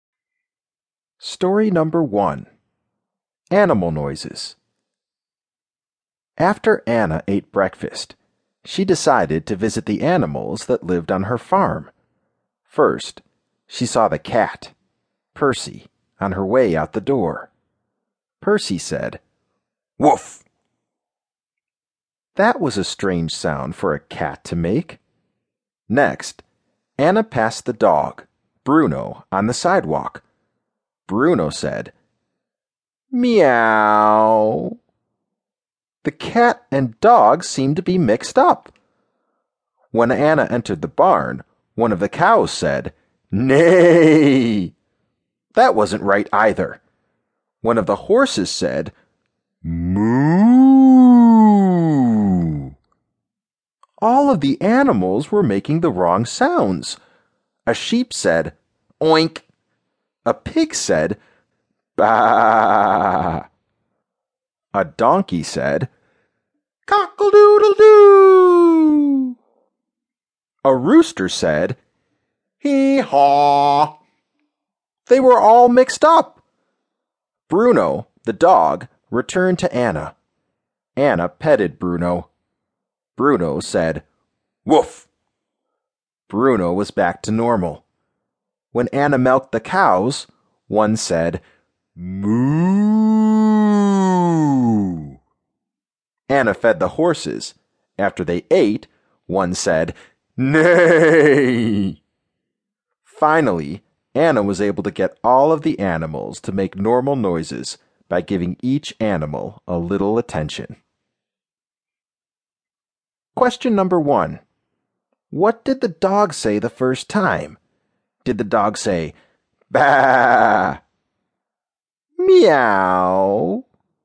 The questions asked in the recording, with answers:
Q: What did the dog say the first time?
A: The dog said, Meow!